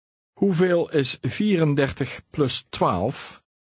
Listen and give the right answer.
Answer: 46. 46.